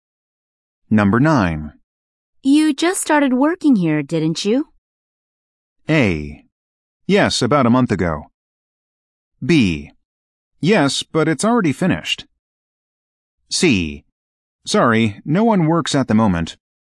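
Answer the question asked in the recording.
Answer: A: Yes, about a month ago.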